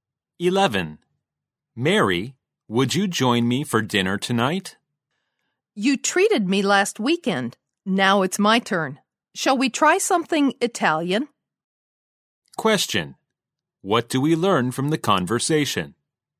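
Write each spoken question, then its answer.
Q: What do we learn from the conversation?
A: The man invites Mary to dinner (perhaps Italian) because she treated him last weekend and it's his turn.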